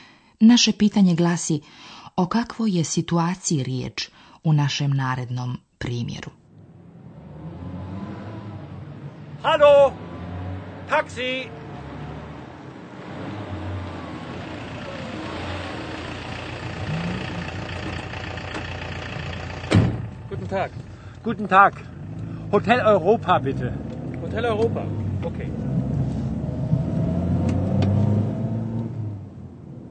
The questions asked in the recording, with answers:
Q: Naše pitanje glasi, o kakvoj je situaciji riječ u našem narednom primjeru?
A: Čovjek stoji na ulici, zaustavlja taksi, i saopštava vozaču gdje želi da ga odveze.